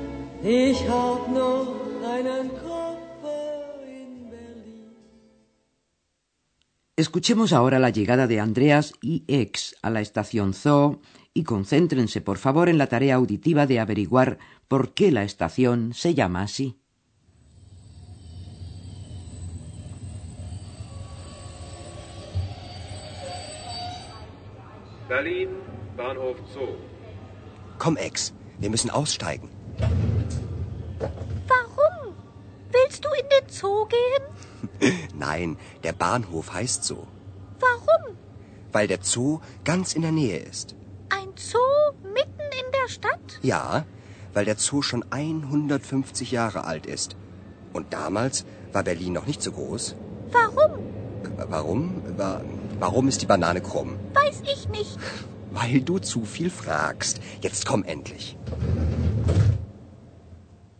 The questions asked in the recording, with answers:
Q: concéntrense, por favor, en la tarea auditiva de averiguar por qué la estación se llama así.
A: La estación se llama Zoo Zoo en alemán porque se encuentra en las inmediaciones del Parque Zoológico de Berlín.